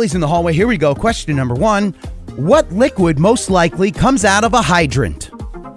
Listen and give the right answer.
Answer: Water.